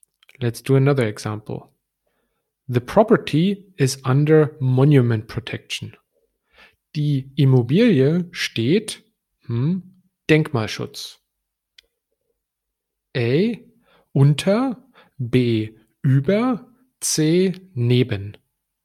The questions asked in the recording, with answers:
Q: Die Immobilie steht hm, Denkmalschutz.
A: And the correct answer would be A.